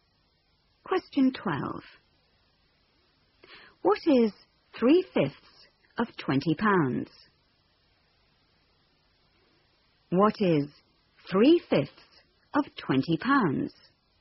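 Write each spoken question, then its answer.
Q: What is 3/5 of £20?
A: £12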